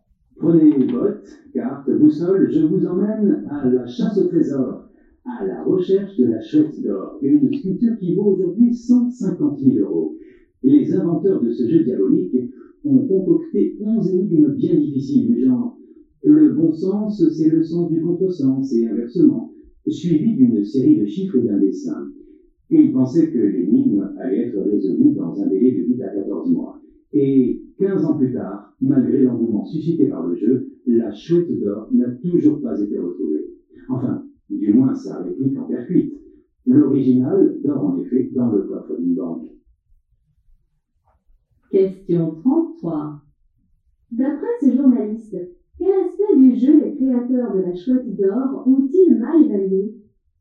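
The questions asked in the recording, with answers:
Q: D'après ce journaliste, quel aspect du jeu les créateurs de la chouette d'or ont-ils mal évalué ?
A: Le temps nécessaire pour résoudre l'énigme (ils pensaient 8 à 14 mois ; 15 ans après, la chouette n'est toujours pas retrouvée)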